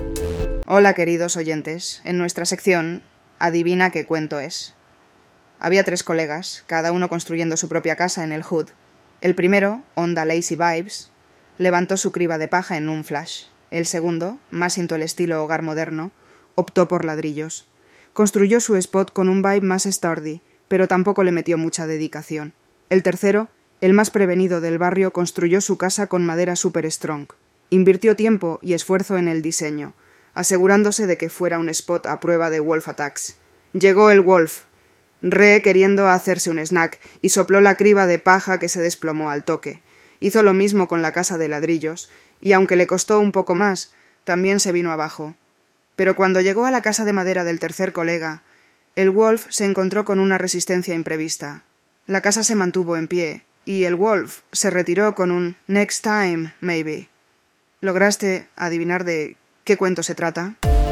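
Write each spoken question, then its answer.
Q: ¿Lograste adivinar de ¿Qué cuento se trata?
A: Los tres cerditos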